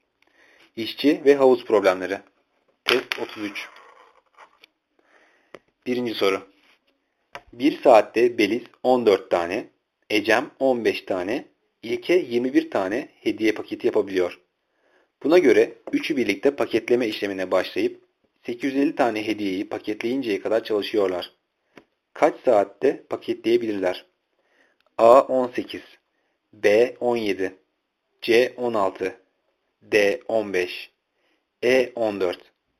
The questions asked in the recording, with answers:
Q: Kaç saatte paketleyebilirler?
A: Cevap B 17.